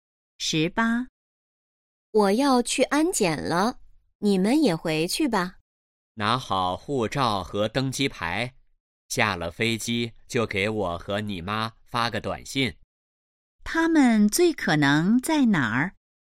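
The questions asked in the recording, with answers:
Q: 他们最可能在哪儿?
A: 机场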